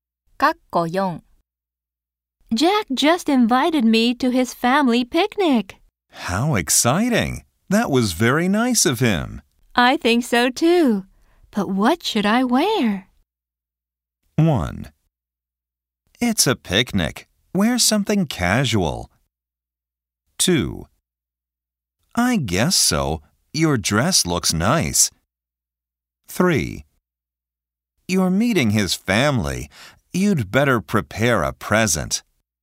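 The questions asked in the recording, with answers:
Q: But what should I wear?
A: 1: It's a picnic. Wear something casual.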